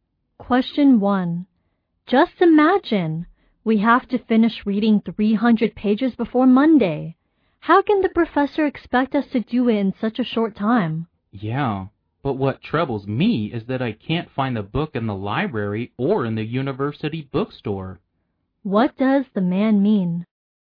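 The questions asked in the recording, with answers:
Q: What does the man mean?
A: He can't find the book he needs for the reading.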